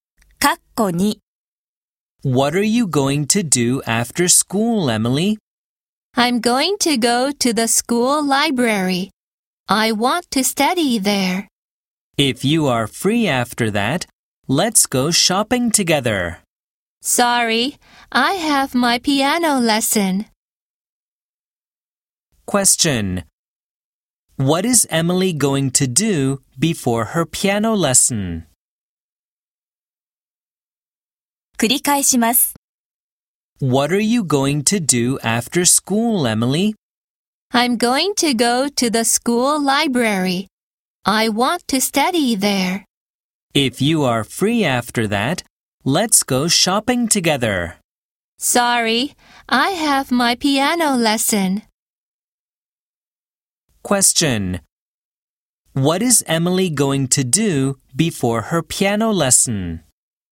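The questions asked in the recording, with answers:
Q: What is Emily going to do before her piano lesson?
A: Study at the school library.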